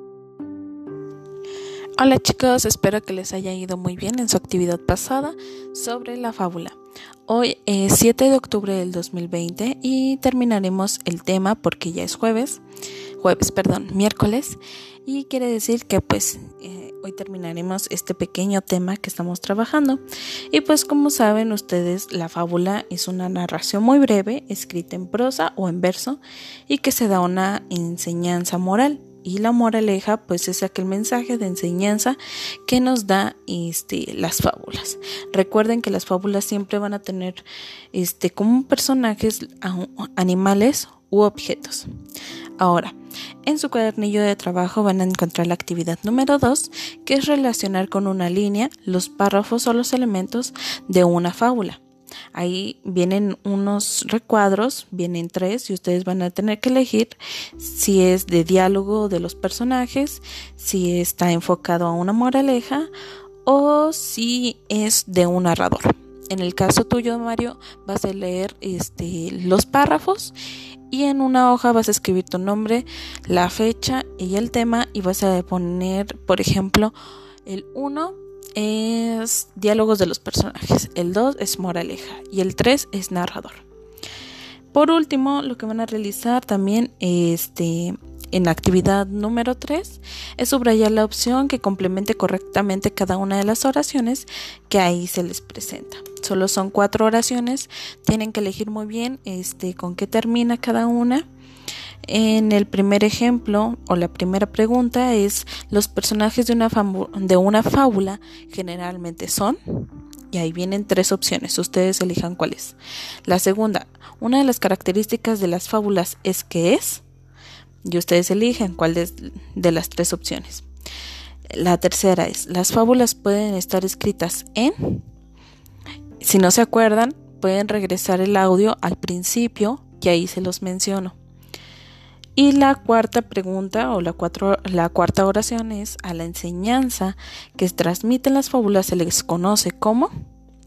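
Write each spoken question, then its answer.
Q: ¿los personajes de una, fábula generalmente son?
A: animales u objetos

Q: las fábulas pueden estar escritas en,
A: prosa o verso

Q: a la enseñanza que transmiten las fábulas se les conoce como...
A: moraleja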